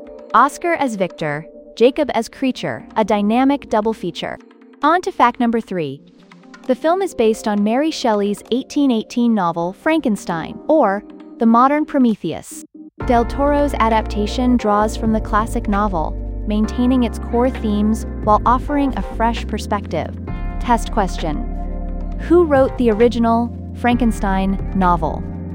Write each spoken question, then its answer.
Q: who wrote the original Frankenstein novel?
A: Mary Shelley.